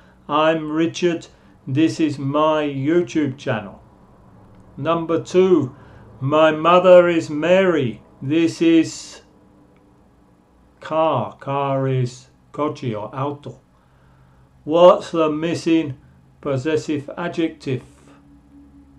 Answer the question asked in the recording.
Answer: my mother is Mary, this is her car.